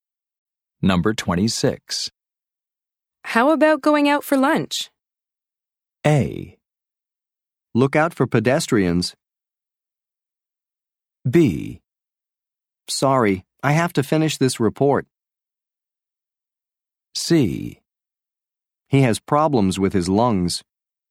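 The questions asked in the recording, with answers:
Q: How about going out for lunch?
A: B: Sorry, I have to finish this report.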